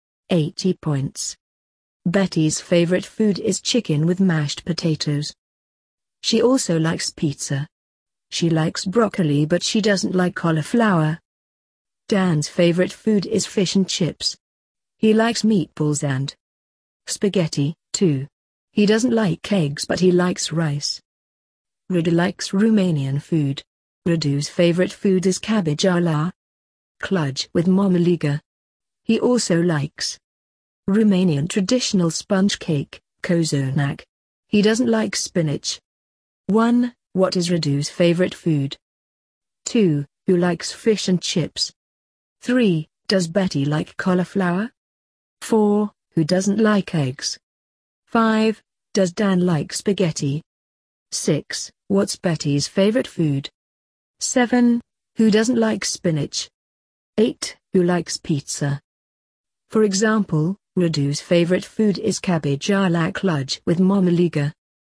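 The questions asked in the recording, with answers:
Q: What is Radu's favorite food?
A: Radu's favorite food is cabbage a la cludge with marmaliga.

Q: Who likes fish and chips?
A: Dan

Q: Does Betty like cauliflower?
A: No, she doesn't.

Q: Who doesn't like eggs?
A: Dan

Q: Does Dan like spaghetti?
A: Yes, he does.

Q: What's Betty's favorite food?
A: Chicken with mashed potatoes

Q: Who doesn't like spinach?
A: Radu

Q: Who likes pizza?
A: Betty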